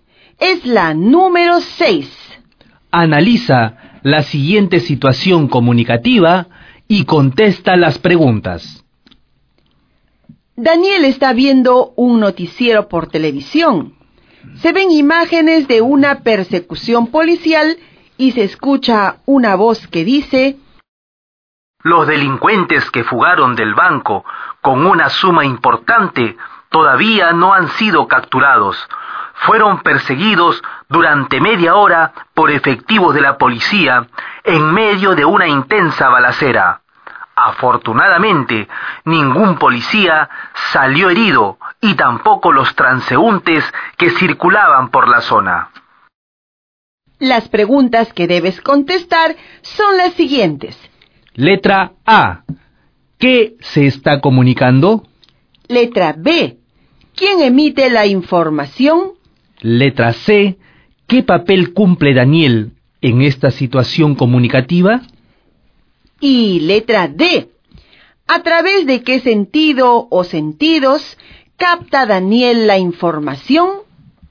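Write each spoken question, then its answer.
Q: ¿Qué se está comunicando?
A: Que los delincuentes que fugaron del banco aún no han sido capturados

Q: ¿Quién emite la información?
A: El locutor o periodista del noticiero

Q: ¿Qué papel cumple Daniel en esta situación comunicativa?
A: Receptor

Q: ¿A través de qué sentido o sentidos capta Daniel la información?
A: La vista y el oído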